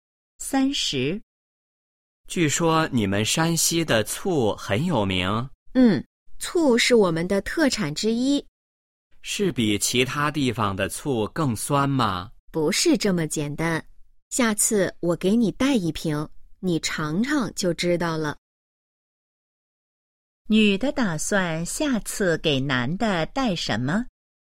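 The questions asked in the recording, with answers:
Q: 女的打算下次给男的带什么?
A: 一瓶醋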